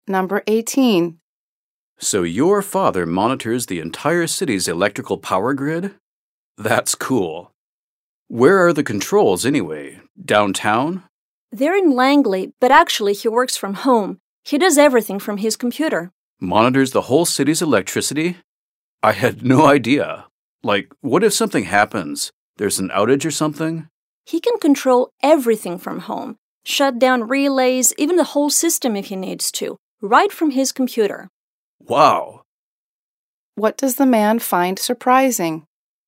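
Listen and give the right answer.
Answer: That the father monitors and controls the whole city's power grid from his computer at home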